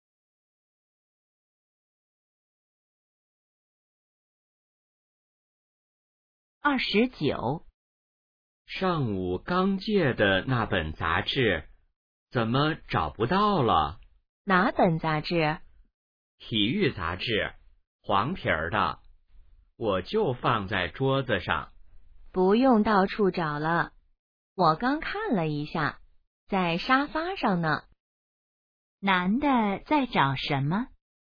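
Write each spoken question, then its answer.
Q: 男的在找什么?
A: 体育杂志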